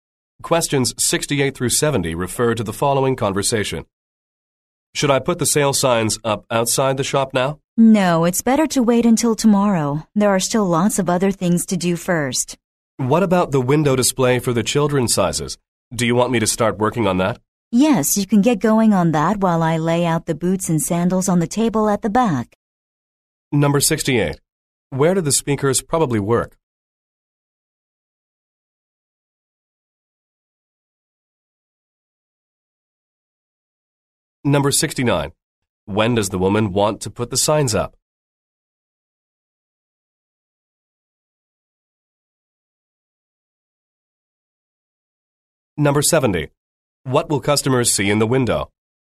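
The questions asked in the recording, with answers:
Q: When does the woman want to put the signs up?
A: Tomorrow

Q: What will customers see in the window?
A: A display of children's sizes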